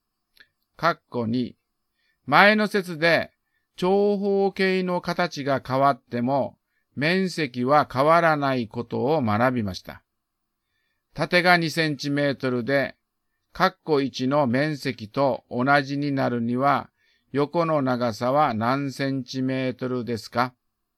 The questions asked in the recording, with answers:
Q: 縦が2センチメートルで、括弧1の面積と同じになるには、横の長さは何センチメートルですか?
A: 12割る2は6。だから答えは6センチメートルです。